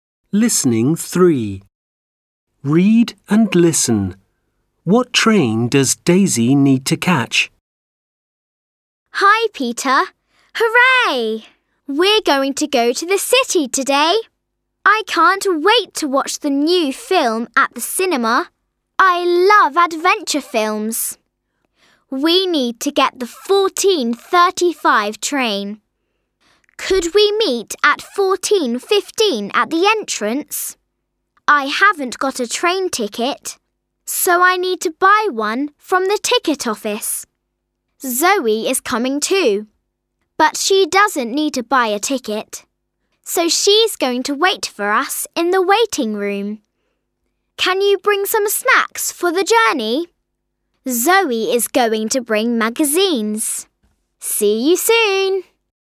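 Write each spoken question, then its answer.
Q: What train does Daisy need to catch?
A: The 14:35 train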